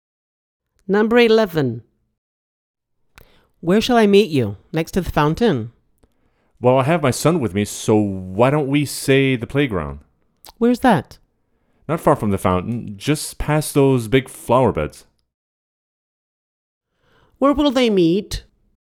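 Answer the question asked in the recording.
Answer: At the playground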